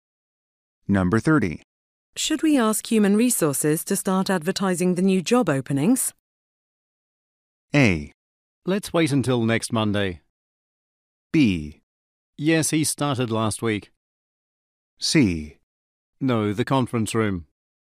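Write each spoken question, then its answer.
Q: Should we ask Human Resources to start advertising the new job openings?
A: A: Let's wait until next Monday.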